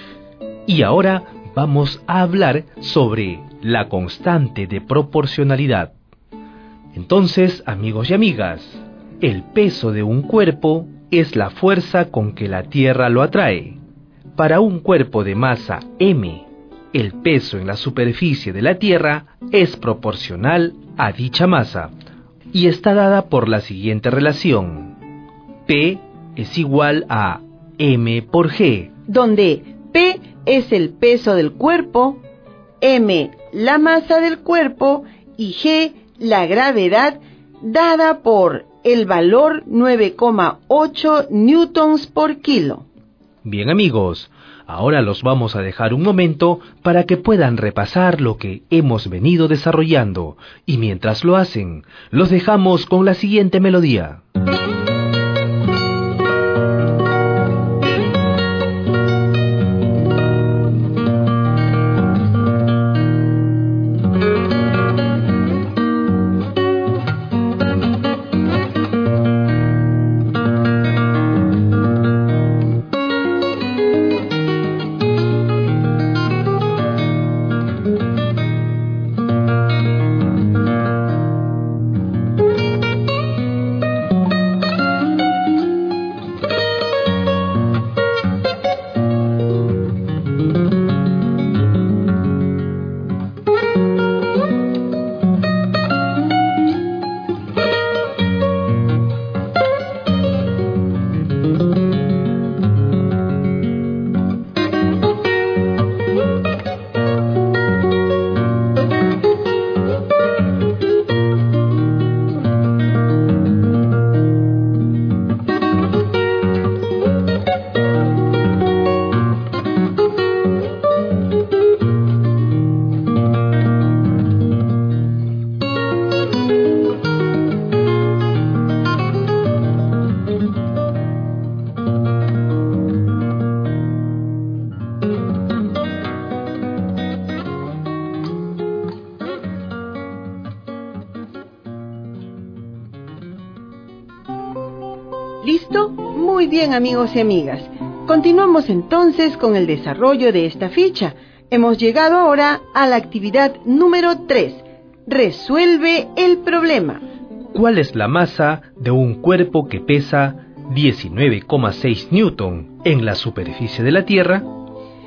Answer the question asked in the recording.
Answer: Por lo tanto, la masa de este cuerpo es igual a 2 kilogramos.